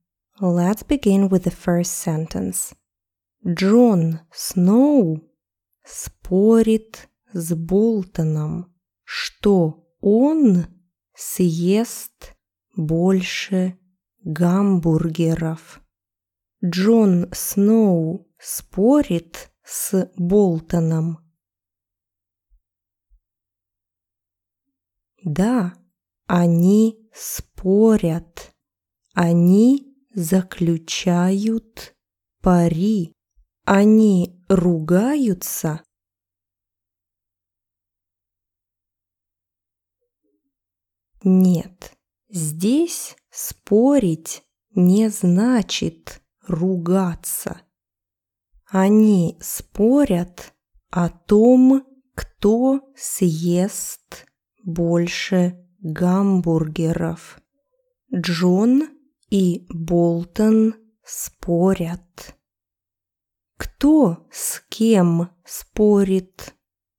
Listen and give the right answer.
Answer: Джон Сноу спорит с Болтоном.